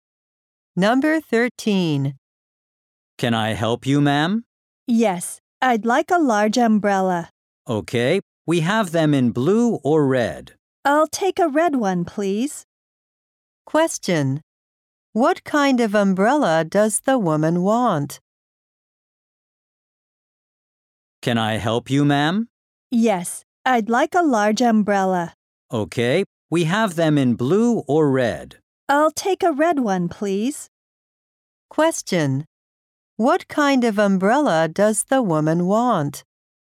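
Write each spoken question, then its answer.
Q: What kind of umbrella does the woman want?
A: A large red umbrella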